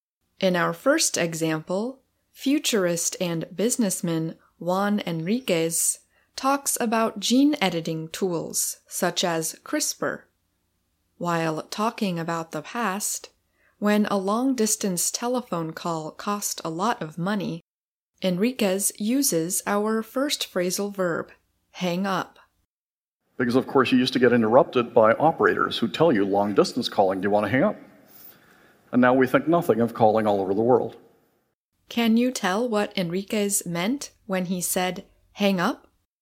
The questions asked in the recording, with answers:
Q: Can you tell what Enriquez meant when he said hang up?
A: to end or finish a phone call